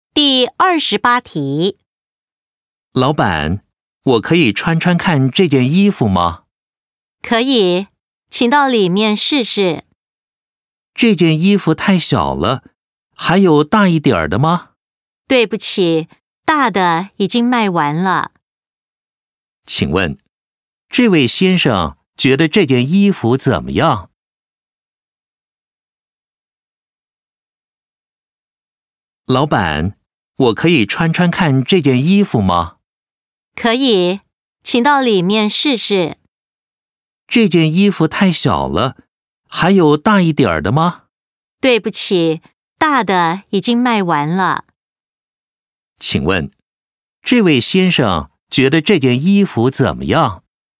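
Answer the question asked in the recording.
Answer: 太小了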